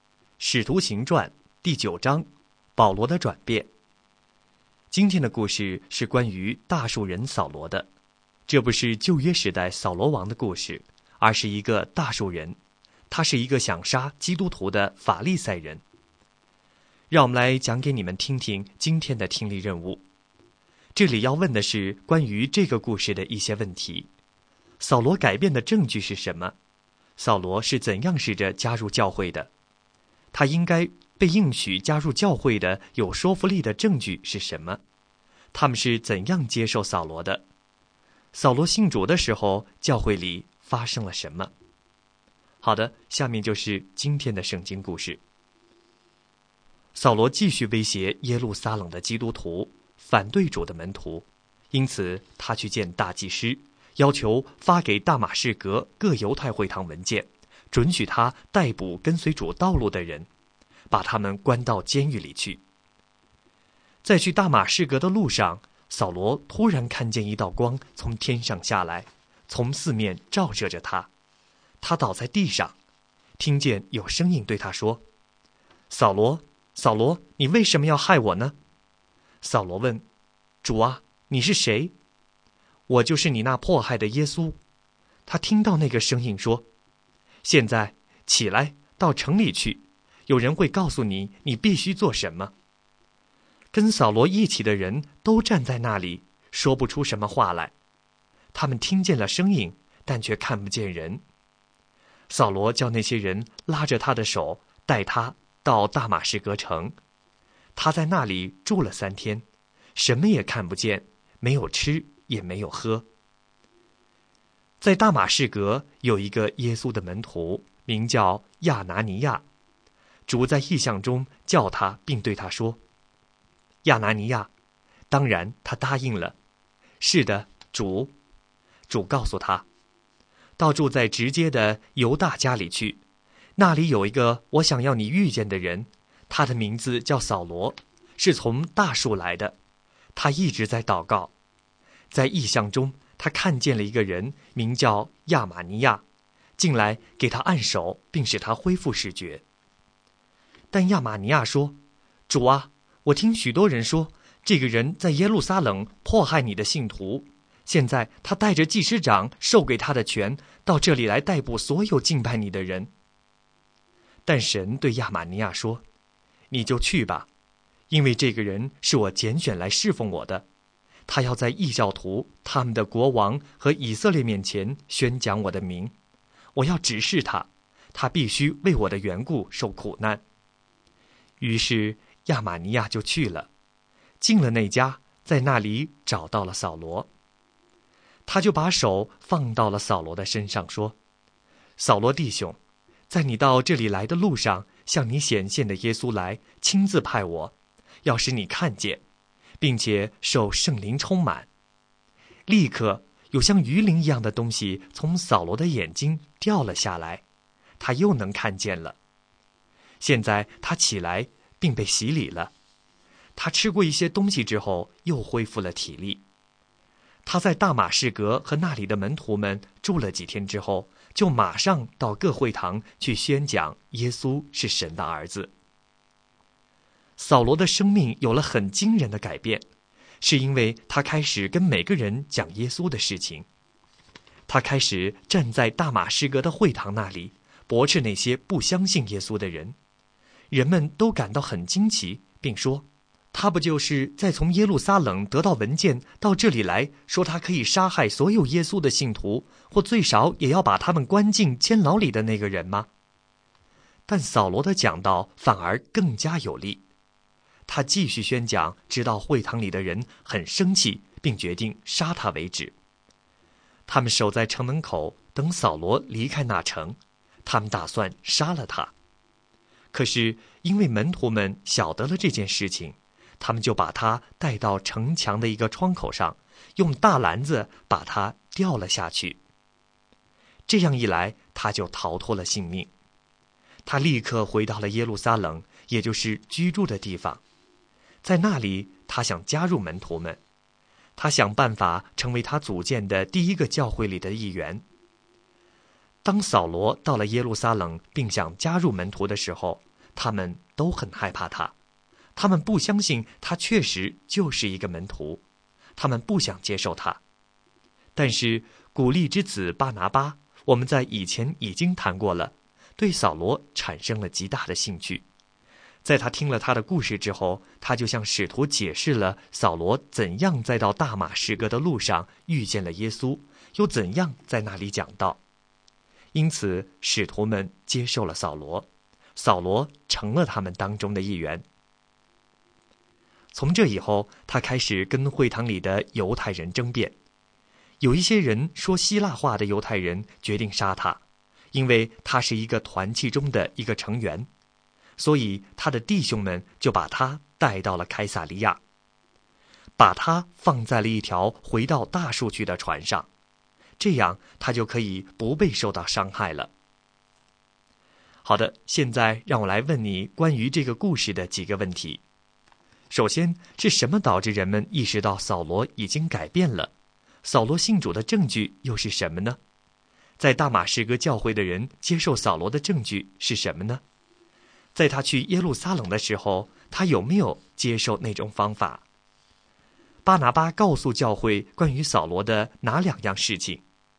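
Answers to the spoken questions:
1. 他开始到各会堂宣讲耶稣是神的儿子
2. 扫罗在去大马士革的路上遇见了耶稣,又在那里讲道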